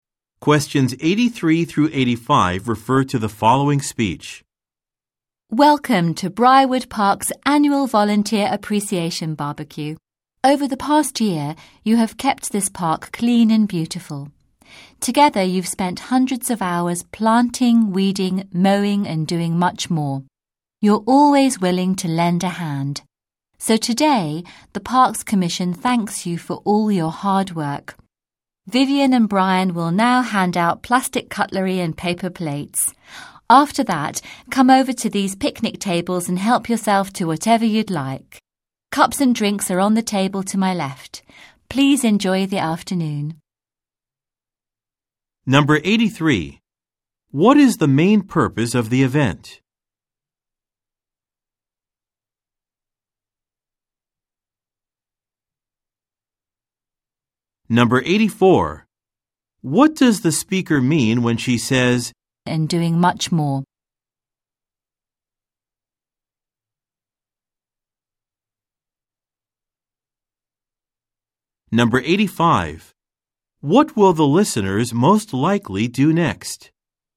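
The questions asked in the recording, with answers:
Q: What is the main purpose of the event?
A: To thank the park volunteers for their work

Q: What does the speaker mean when she says, and doing much more?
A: The volunteers did many different kinds of tasks

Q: What will the listeners most likely do next?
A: Get plates and cutlery from Vivian and Brian, then get food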